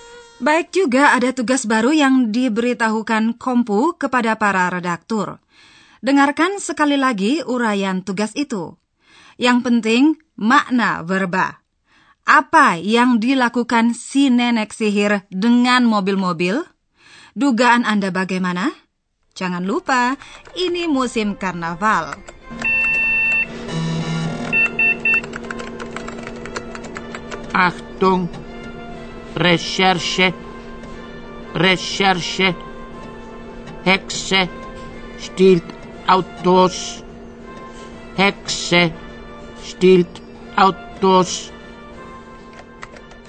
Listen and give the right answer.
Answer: Samaran sebagai nenek sihir dimanfaatkannya untuk mencuri mobil.